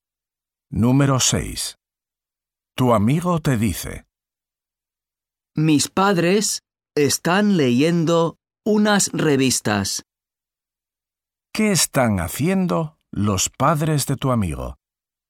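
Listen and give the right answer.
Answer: Leyendo revistas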